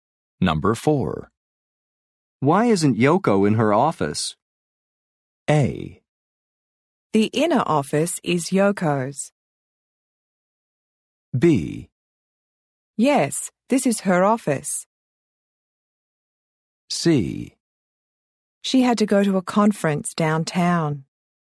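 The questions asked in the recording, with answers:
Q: Why isn't Yoko in her office?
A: C: She had to go to a conference downtown.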